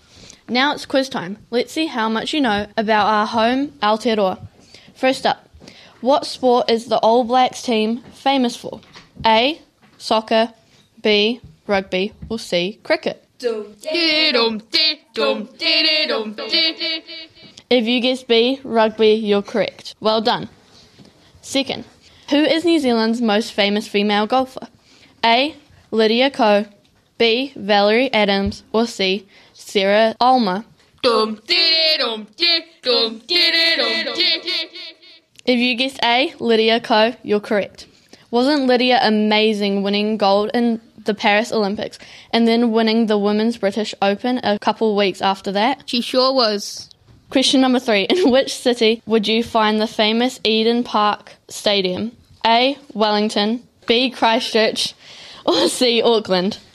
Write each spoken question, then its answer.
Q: First up, what sport is the All Blacks team famous for?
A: If you guess B, rugby, you're correct.

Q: Second, who is New Zealand's most famous female golfer?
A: If you guess A, Lydia Ko, you're correct.